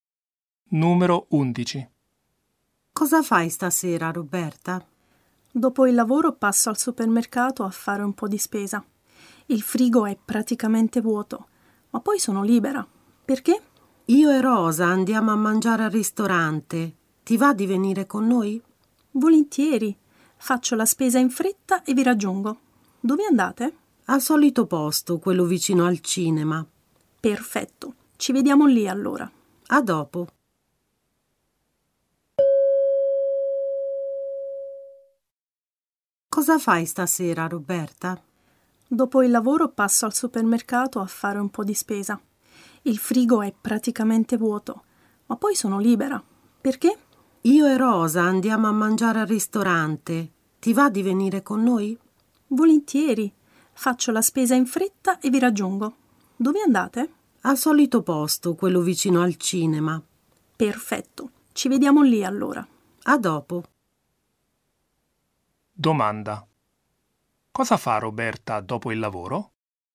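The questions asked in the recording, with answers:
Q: cosa fa Roberta dopo il lavoro?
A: Fa la spesa al supermercato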